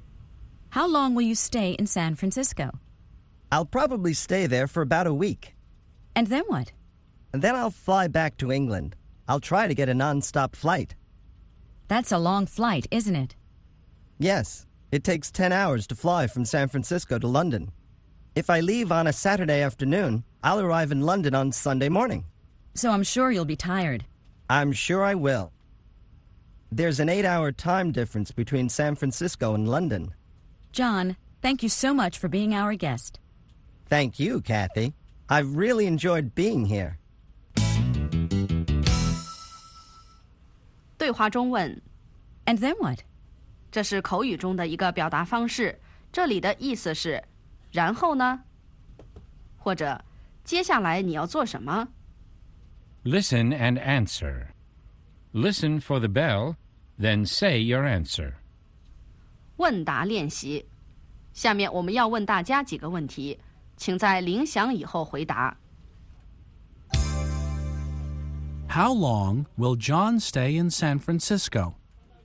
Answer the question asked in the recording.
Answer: He'll probably stay there for about a week.